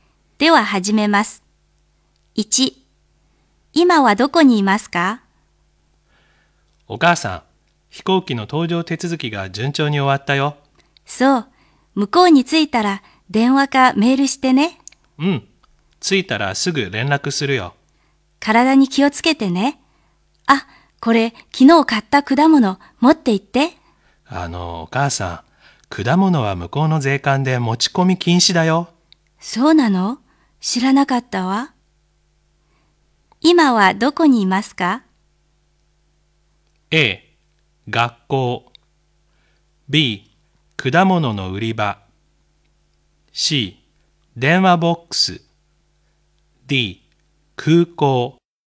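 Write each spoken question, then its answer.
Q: 今はどこにいますか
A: D: 空港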